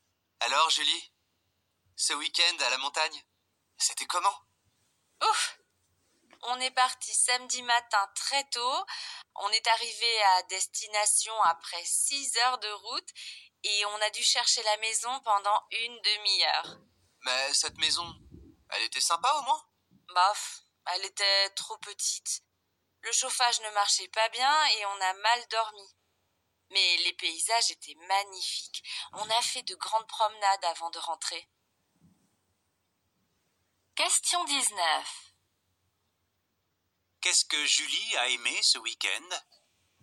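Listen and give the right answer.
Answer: Les paysages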